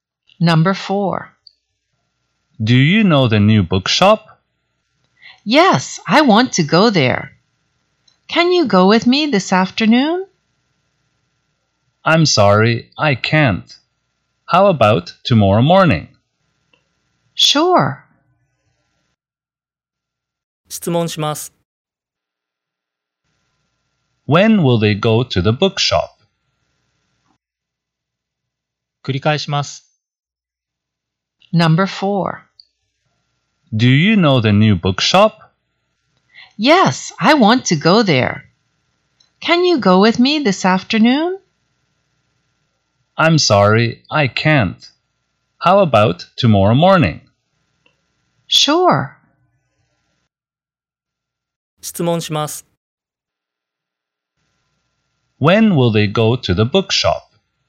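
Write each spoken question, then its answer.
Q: When will they go to the bookshop?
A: Tomorrow morning.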